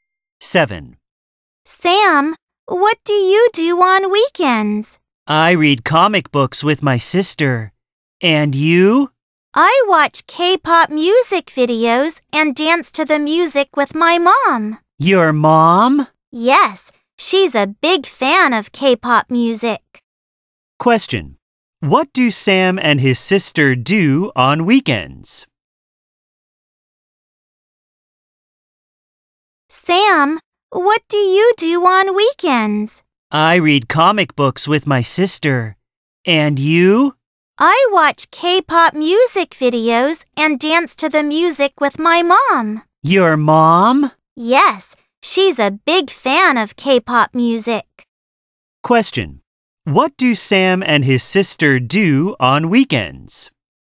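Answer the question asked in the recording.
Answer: They read comic books.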